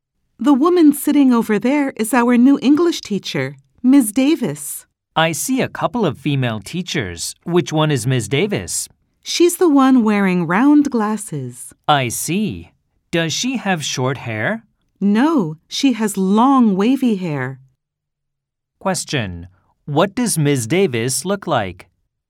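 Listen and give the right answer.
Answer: She wears round glasses and has long wavy hair.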